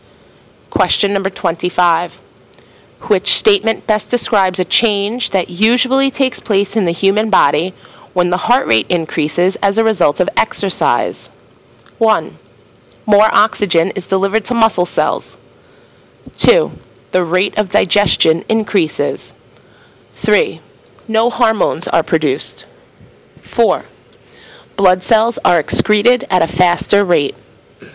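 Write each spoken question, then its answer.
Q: Which statement best describes a change that usually takes place in the human body when the heart rate increases as a result of exercise?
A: 1: More oxygen is delivered to muscle cells.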